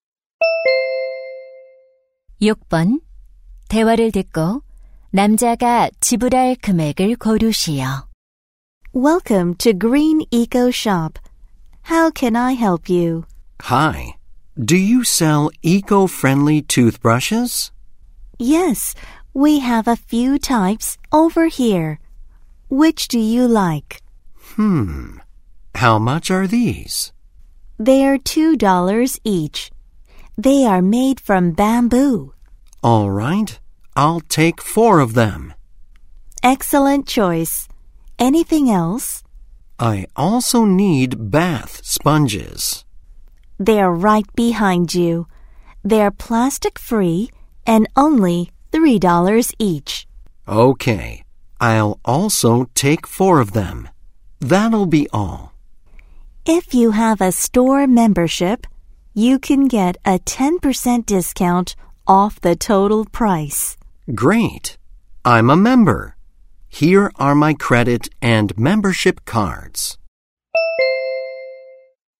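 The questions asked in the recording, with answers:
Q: 대화를 듣고 남자가 지불할 금액을 고르시오.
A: $18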